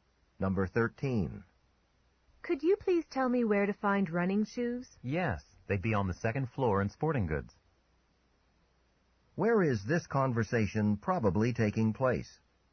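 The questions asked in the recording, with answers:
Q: Where is this conversation probably taking place?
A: In a department store.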